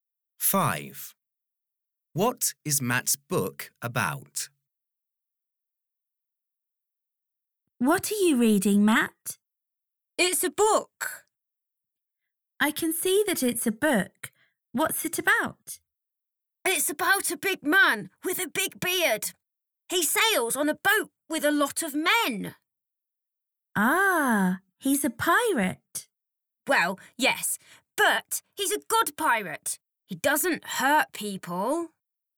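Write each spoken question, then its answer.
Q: What is Matt's book about?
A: A good pirate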